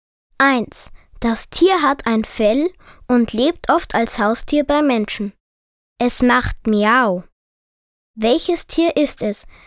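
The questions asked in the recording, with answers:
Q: Es macht Miau. Welches Tier ist es?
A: Katze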